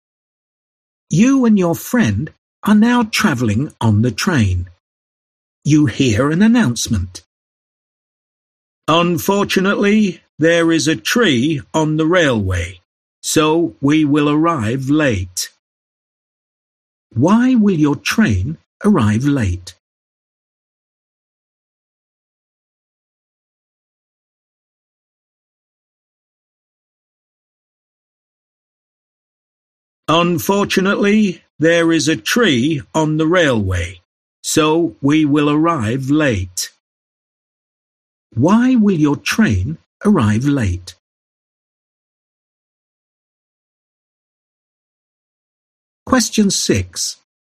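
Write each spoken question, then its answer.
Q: Why will your train arrive late?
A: There is a tree on the railway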